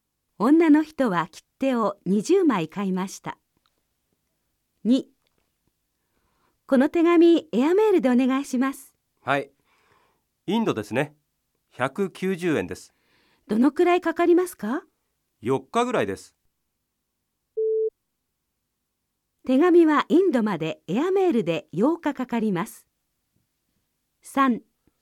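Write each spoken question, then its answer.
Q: 手紙はインドまでエアメールで8日かかります。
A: ×(4日ぐらい)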